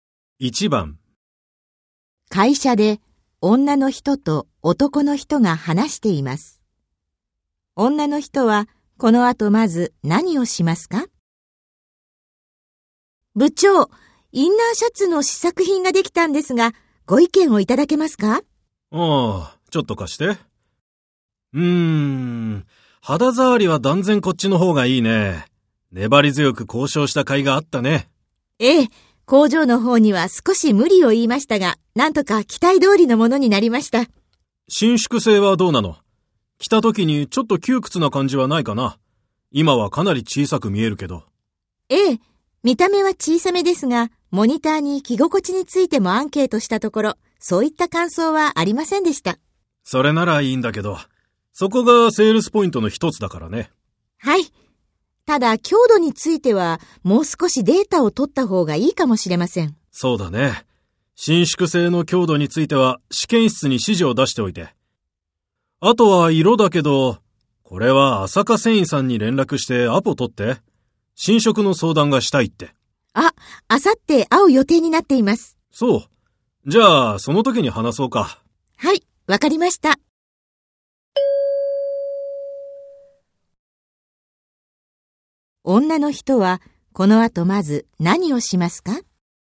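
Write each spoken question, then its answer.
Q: 女の人はこの後まず何をしますか?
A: 試験室に伸縮性の強度について(データを取るよう)指示を出す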